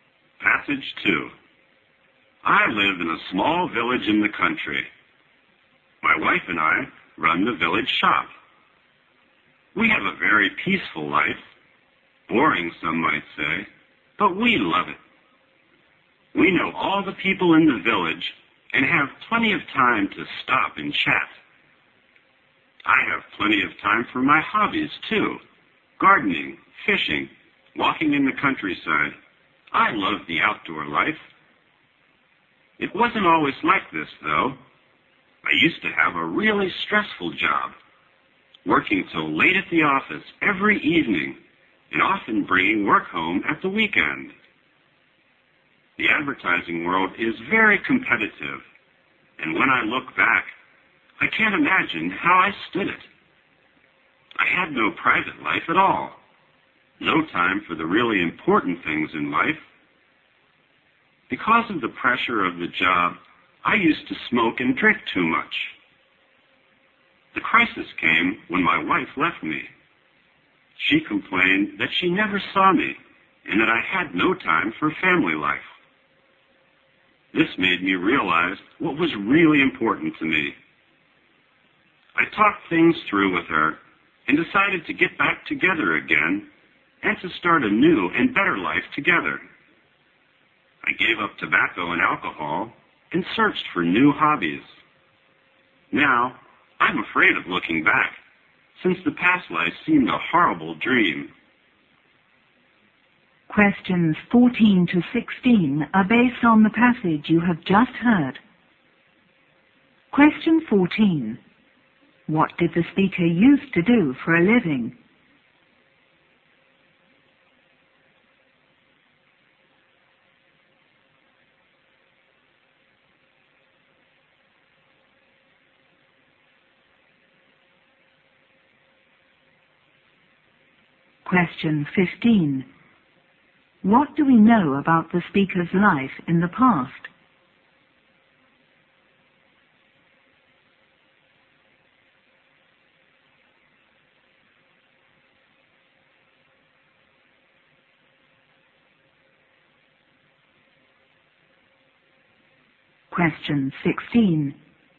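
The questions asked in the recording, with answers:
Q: What did the speaker used to do for a living?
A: He worked in advertising

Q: What do we know about the speaker's life in the past?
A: It was stressful with no private life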